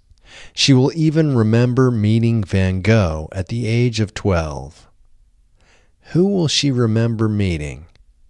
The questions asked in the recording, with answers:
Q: Who will she remember meeting?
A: She will remember meeting Van Gogh.